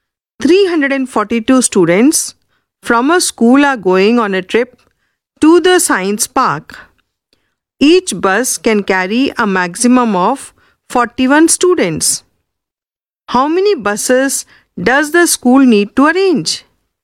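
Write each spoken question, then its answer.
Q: How many buses does the school need to arrange?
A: 9 buses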